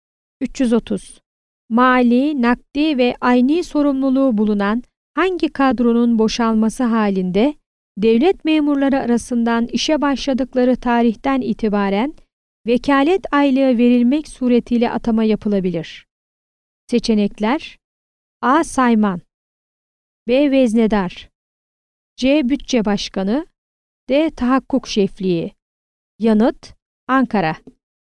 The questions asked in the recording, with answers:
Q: Mali, nakdi ve ayni sorumluluğu bulunan hangi kadronun boşalması halinde devlet memurları arasından işe başladıkları tarihten itibaren vekalet aylığı verilmek suretiyle atama yapılabilir?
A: Yanıt: Ankara.